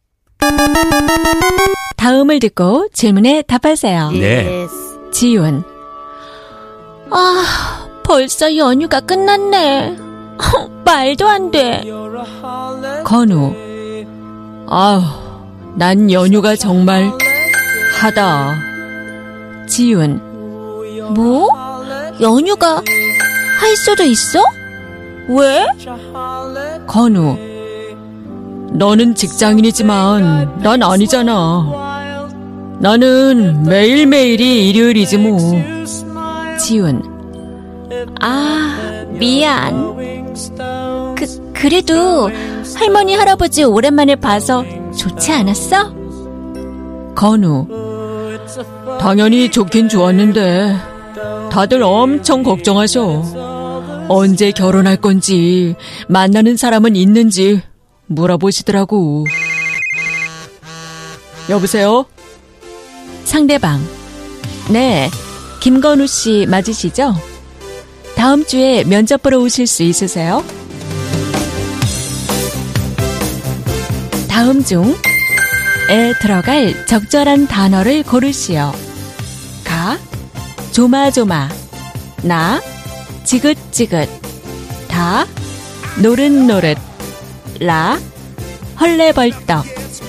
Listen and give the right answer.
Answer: Well, na, chiga-chiga. I'm tired of this holiday.